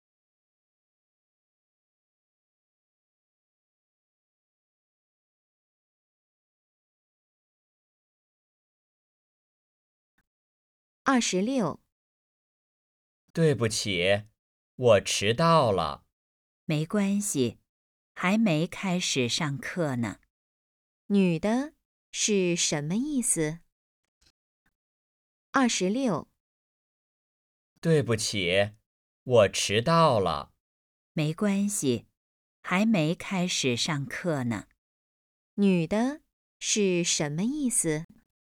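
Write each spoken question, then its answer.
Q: 女的是什么意思?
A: 没关系,还没开始上课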